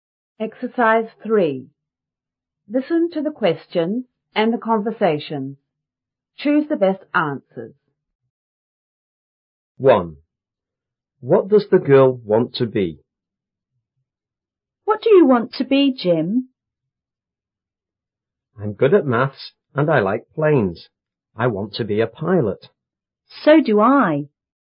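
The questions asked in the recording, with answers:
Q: What does the girl want to be?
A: A pilot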